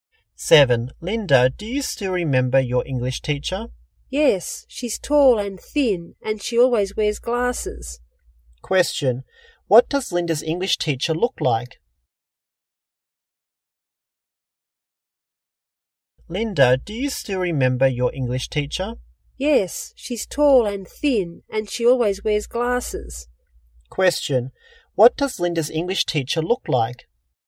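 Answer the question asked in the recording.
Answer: Tall and thin, wears glasses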